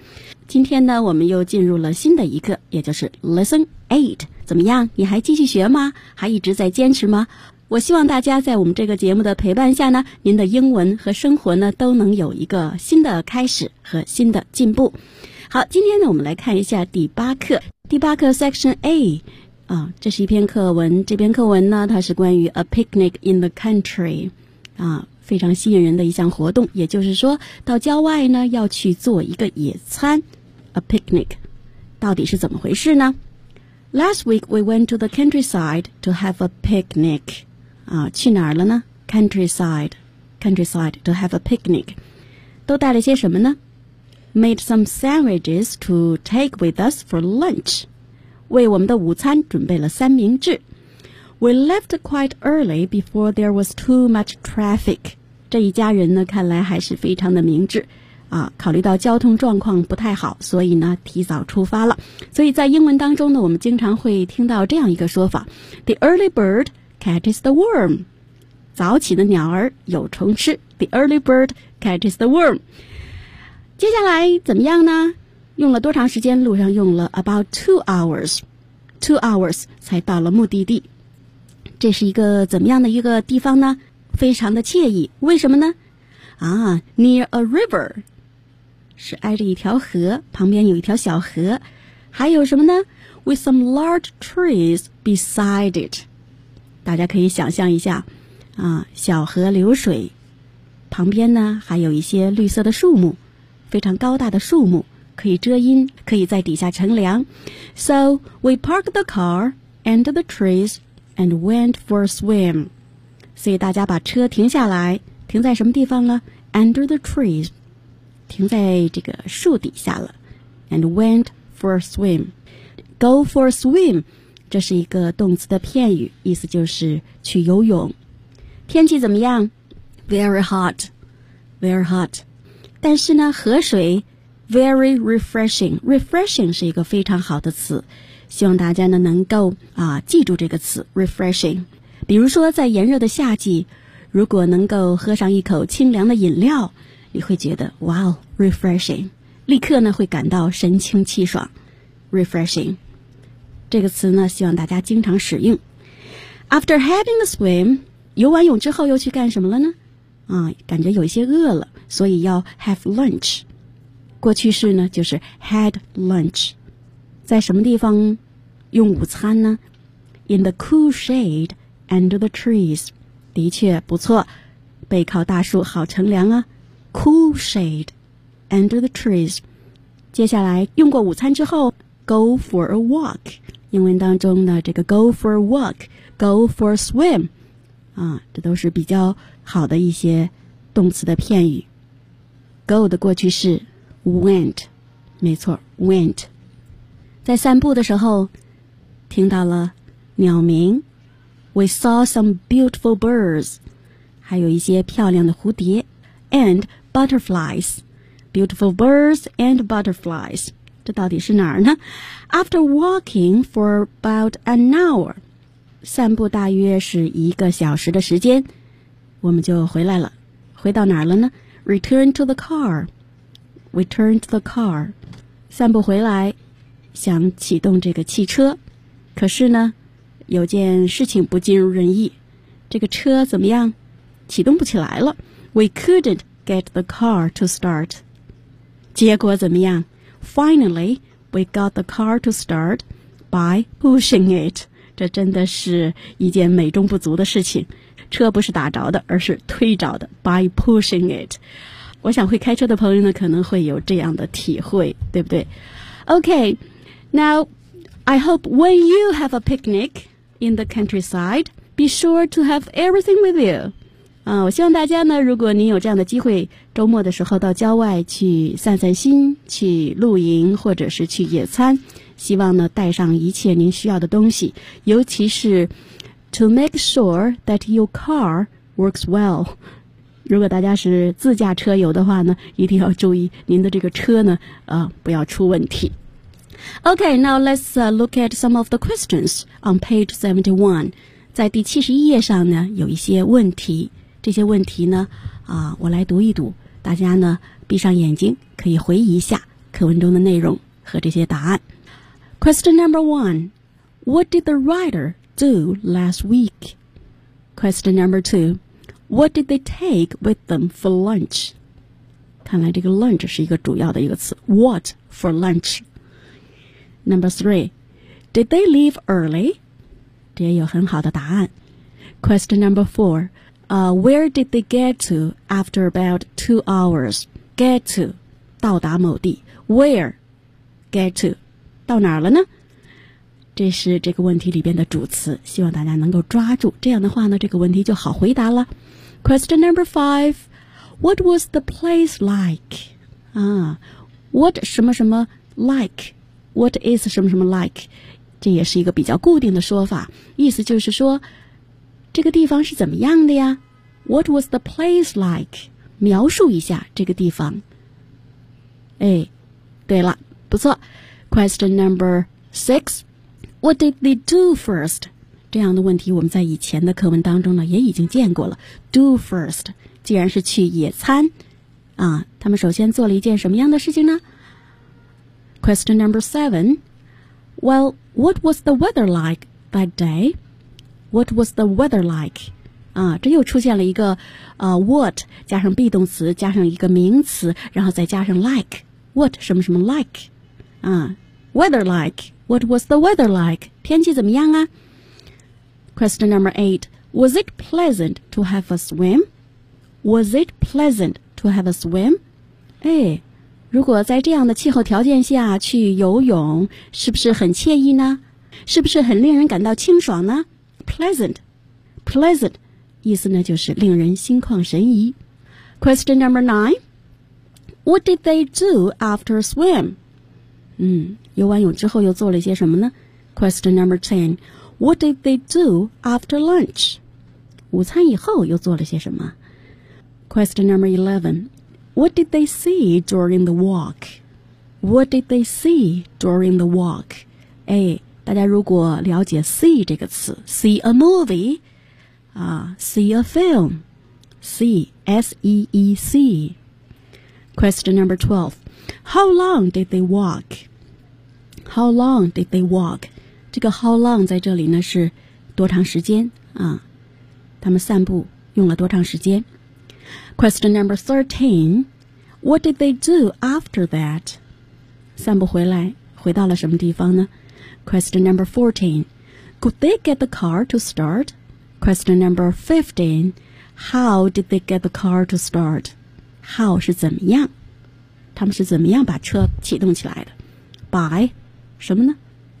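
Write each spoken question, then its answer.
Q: what did the writer do last week?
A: They went to the countryside to have a picnic.

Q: what did they take with them for lunch?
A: Sandwiches.

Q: did they leave early?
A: Yes, they left quite early, before there was too much traffic.

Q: where did they get to after about 2 hours?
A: A nice place near a river with some large trees beside it.

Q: what was the place like?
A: It was nice, near a river with some large trees beside it.

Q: What did they do first?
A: They parked the car under the trees and went for a swim.

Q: Well, what was the weather like that day?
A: It was very hot.

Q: was it pleasant to have a swim?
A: Yes, the water was very refreshing.

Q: What did they do after swim?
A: They had lunch in the cool shade under the trees.

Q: What did they do after lunch?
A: They went for a walk.

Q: What did they see during the walk?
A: Some beautiful birds and butterflies.

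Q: How long did they walk?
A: About an hour.

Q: What did they do after that?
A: They returned to the car.

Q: Could they get the car to start?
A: No, they couldn't at first.

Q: how did they get the car to start?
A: 对了 ,pushing it.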